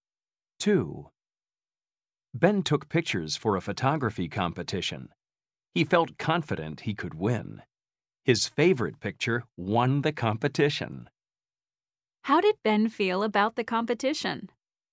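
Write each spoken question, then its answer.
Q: How did Ben feel about the competition?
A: confident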